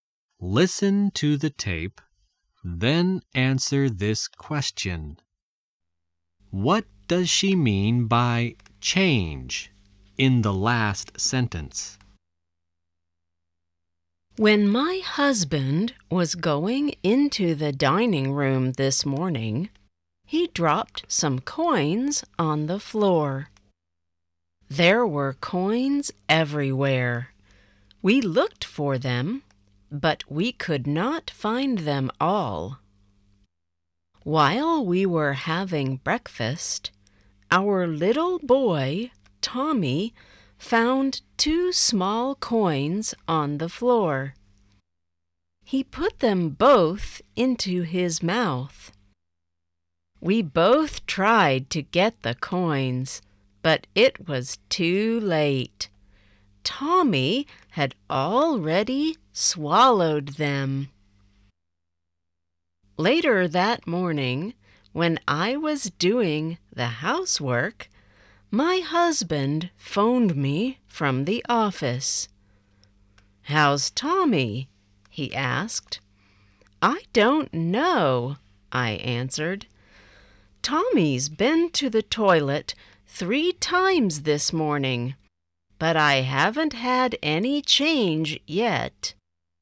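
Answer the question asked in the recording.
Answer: The small coins Tommy swallowed (a joke: there has been no change in Tommy, and the coins haven't come out yet)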